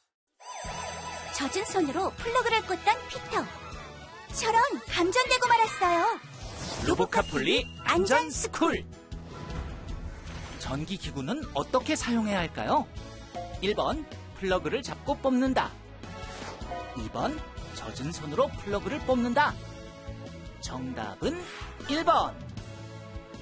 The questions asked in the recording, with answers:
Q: 전기기구는 어떻게 사용해야 할까요?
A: 정답은 1번.